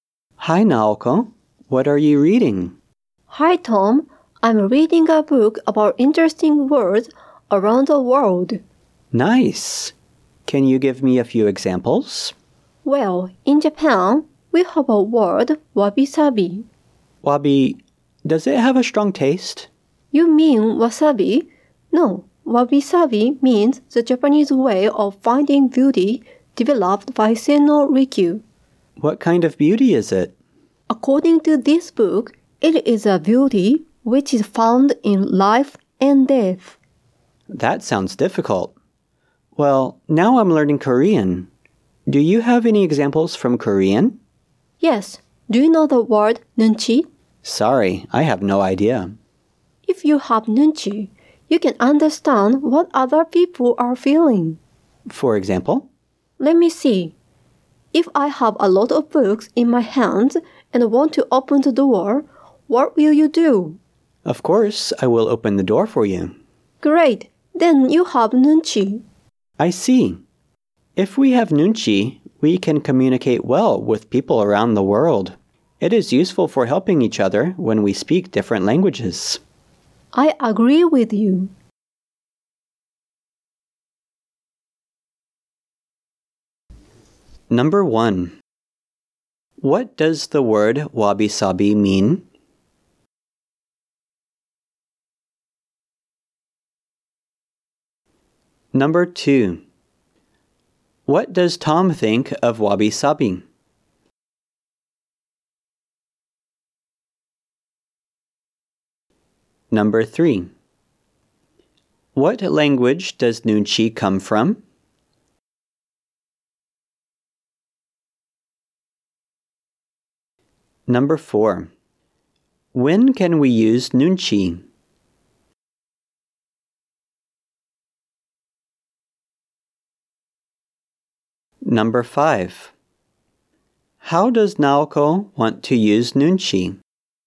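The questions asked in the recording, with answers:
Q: What does the word wabi-sabi mean?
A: The Japanese way of finding beauty developed by Sen no Rikyu

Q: What does Tom think of wabi-sabi?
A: He thinks it sounds difficult

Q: What language does nunchi come from?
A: Korean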